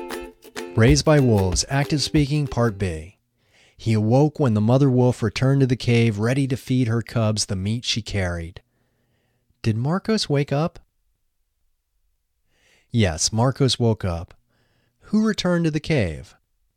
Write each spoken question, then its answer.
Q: Who returned to the cave?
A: The mother wolf returned to the cave.